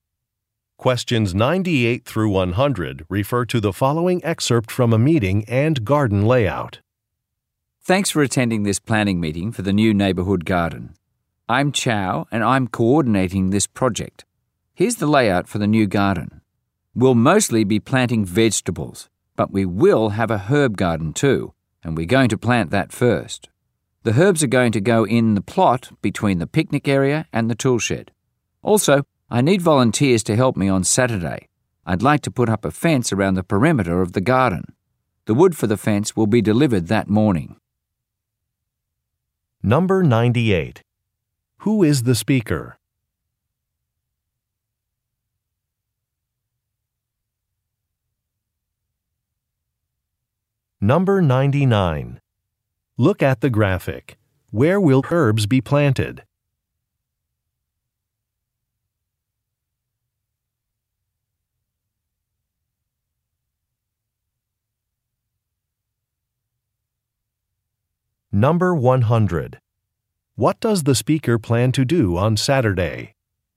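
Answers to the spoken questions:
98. The project coordinator for the neighborhood garden
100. Put up a fence around the garden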